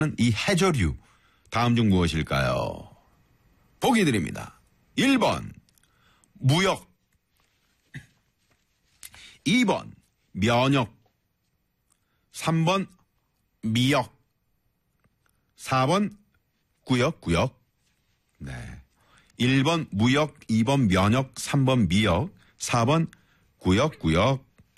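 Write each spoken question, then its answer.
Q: 이 해저류 다음 중 무엇일까요?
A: 3: 미역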